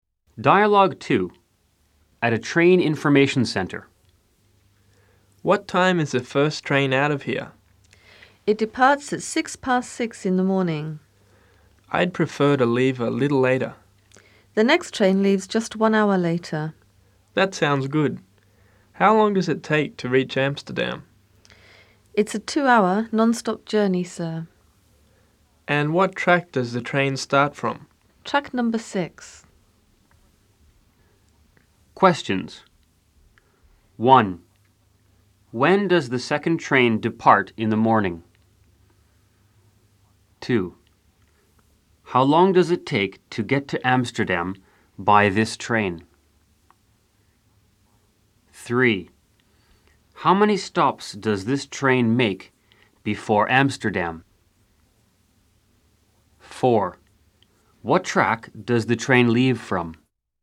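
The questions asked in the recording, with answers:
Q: When does the second train depart in the morning?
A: At 7:06

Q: How long does it take to get to Amsterdam by this train?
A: 2 hours

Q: How many stops does this train make before Amsterdam?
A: None (non-stop)

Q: What track does the train leave from?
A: Track 6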